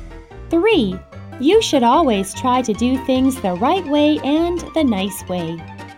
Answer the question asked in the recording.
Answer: True.